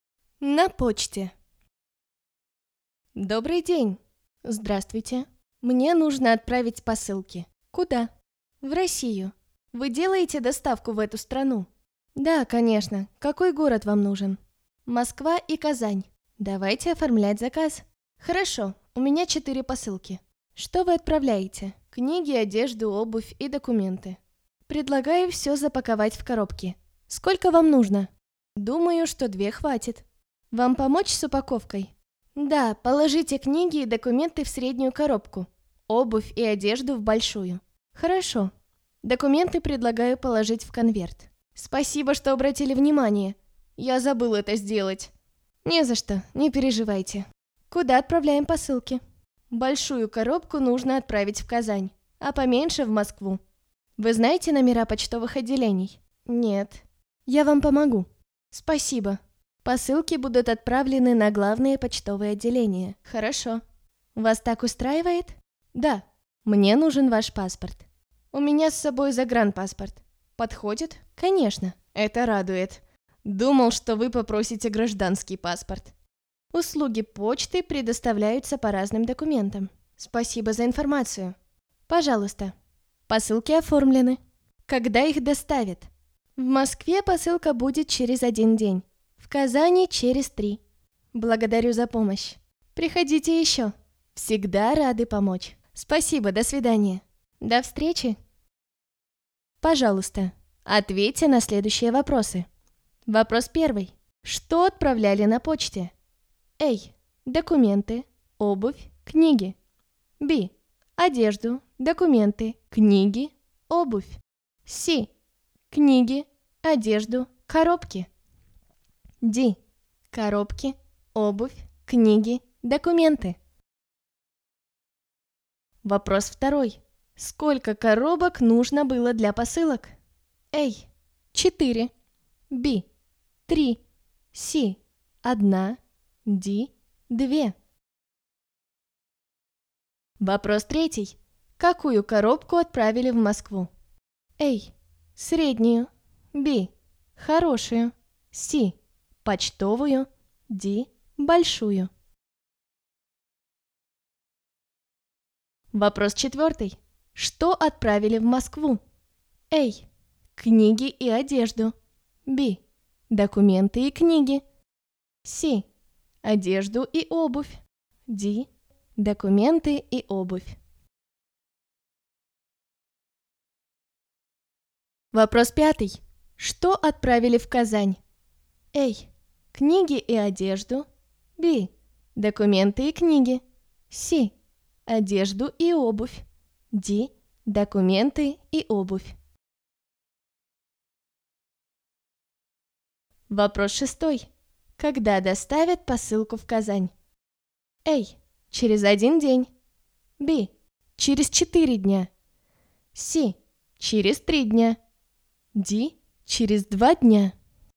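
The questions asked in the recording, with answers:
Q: Что отправляли на почте?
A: B: одежду, документы, книги, обувь

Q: Сколько коробок нужно было для посылок?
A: D: 2

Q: Какую коробку отправили в Москву?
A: A: среднюю

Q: Что отправили в Москву?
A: B: документы и книги

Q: Что отправили в Казань?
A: C: одежду и обувь

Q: Когда доставят посылку в Казань?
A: C: через 3 дня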